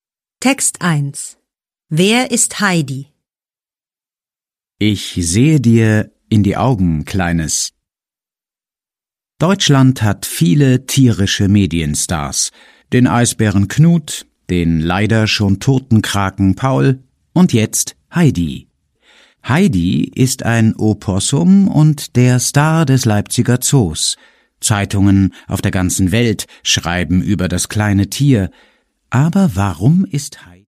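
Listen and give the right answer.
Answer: Ein Opossum, der Star des Leipziger Zoos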